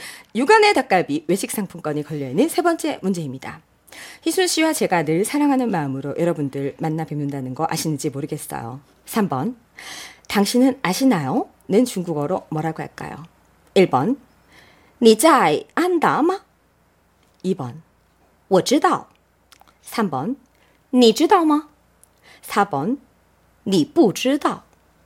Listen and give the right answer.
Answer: 순 3번이죠.